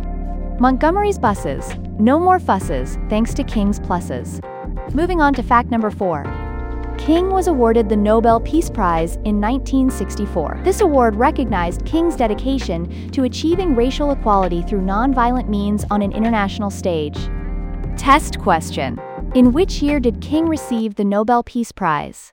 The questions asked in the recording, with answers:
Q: In which year did King receive the Nobel Peace Prize?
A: Correct answer, 1964.